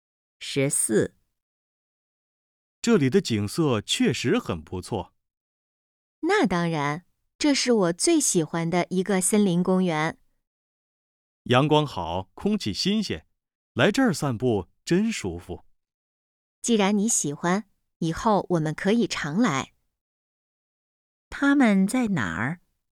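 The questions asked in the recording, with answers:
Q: 他们在哪儿?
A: 森林公园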